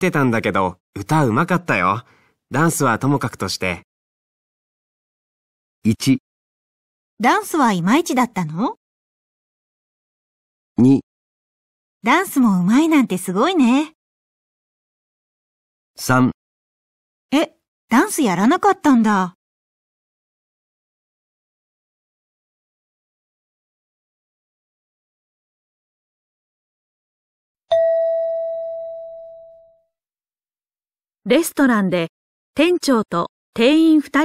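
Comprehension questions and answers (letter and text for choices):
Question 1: この前文化祭のステージに阿部くんが出てたんだけど、歌うまかったよ。ダンスはともかくとして。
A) ダンスはいまいちだったの?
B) ダンスもうまいなんてすごいね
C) え?ダンスやらなかったんだ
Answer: A) ダンスはいまいちだったの?

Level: 【N2 第2回】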